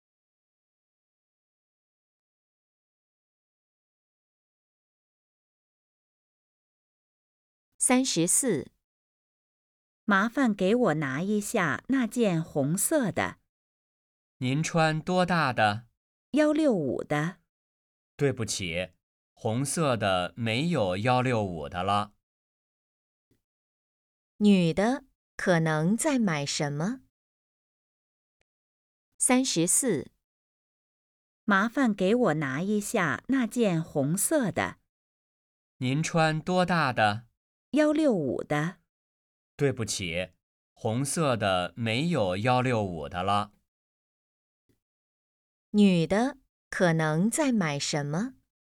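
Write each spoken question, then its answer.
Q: 女的可能在买什么?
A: 衣服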